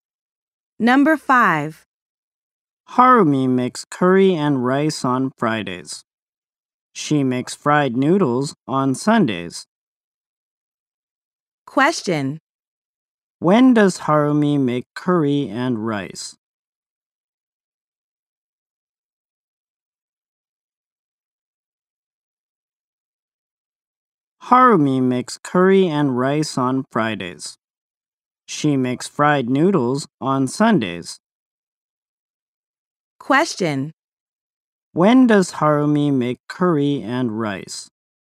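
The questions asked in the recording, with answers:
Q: When does Harumi make curry and rice?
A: On Fridays.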